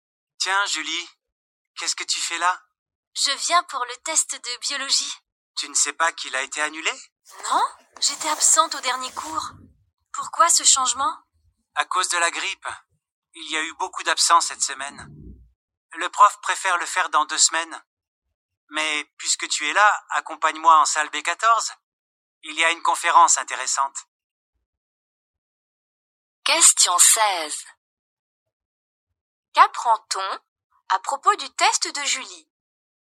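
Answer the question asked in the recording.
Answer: Il a été annulé et reporté de 2 semaines à cause de la grippe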